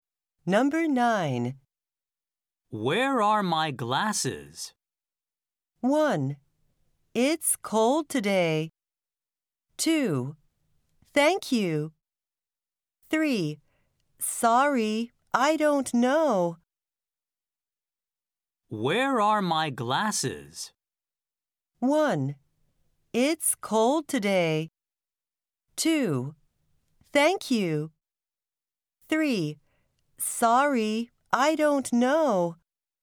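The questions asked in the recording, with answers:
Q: Where are my glasses?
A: 3: Sorry, I don't know.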